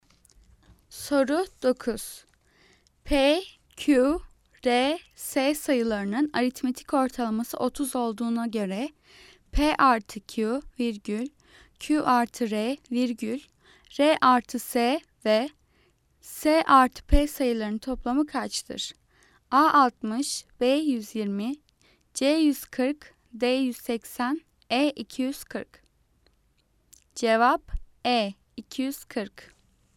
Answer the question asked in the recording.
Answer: Cevap E 240.